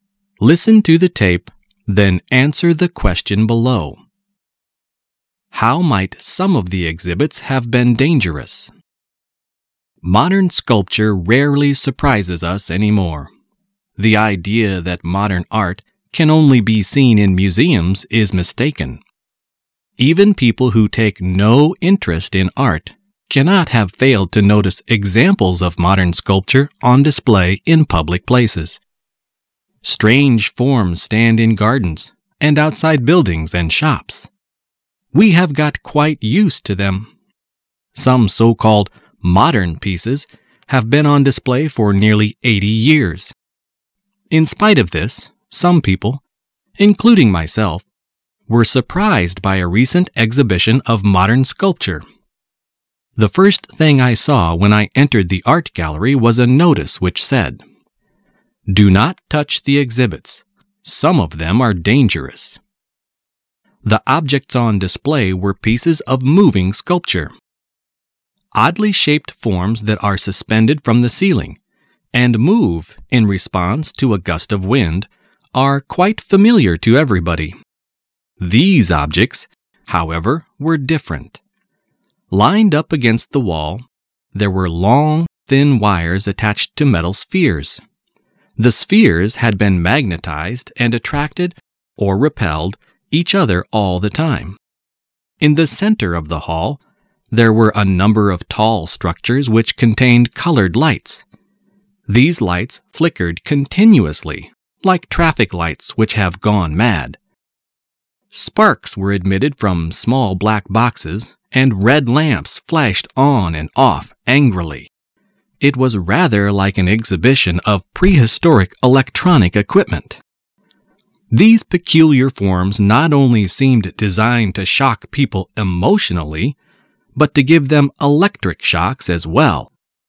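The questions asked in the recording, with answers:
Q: How might some of the exhibits have been dangerous?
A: They could give people electric shocks.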